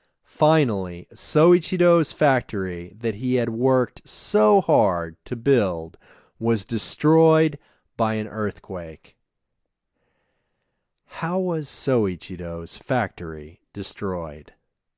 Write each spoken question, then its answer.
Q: How was Soichiro's factory destroyed?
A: Soichiro's factory was destroyed by an earthquake.